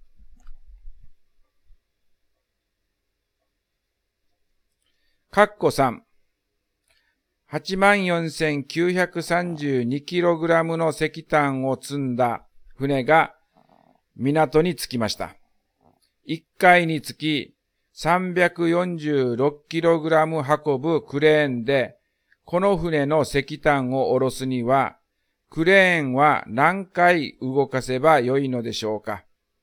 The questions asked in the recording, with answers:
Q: 346kg 運ぶクレーンで、この船の石炭を下ろすには、クレーンは何回動かせばよいのでしょうか。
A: だから答えは246回になります。